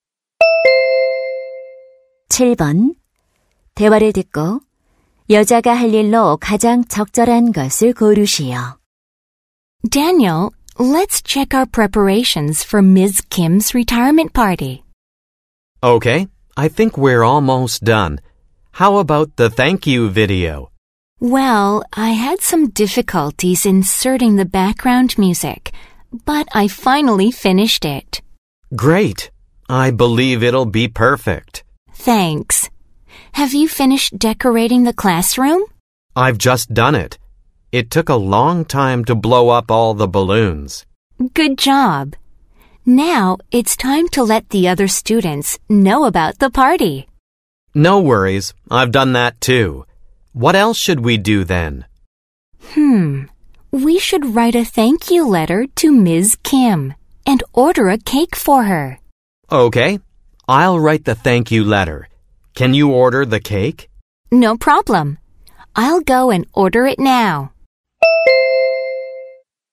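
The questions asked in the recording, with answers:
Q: 대화를 듣고 여자가 할 일로 가장 적절한 것을 고르시오.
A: 케이크 주문하기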